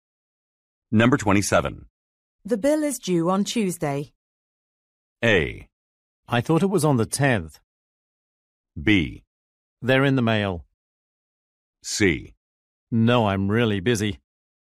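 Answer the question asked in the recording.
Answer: A: I thought it was on the 10th.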